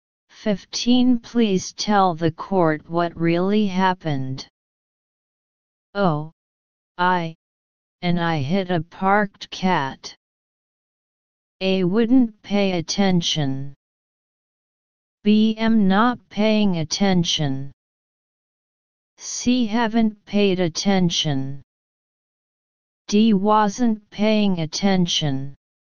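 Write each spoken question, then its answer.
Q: Please tell the court what really happened.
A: D: wasn't paying attention.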